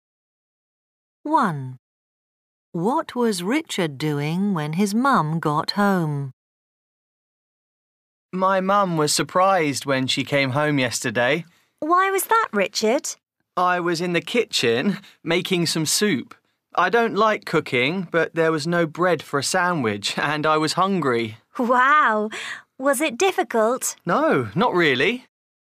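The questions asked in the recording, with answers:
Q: What was Richard doing when his mum got home?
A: Making soup in the kitchen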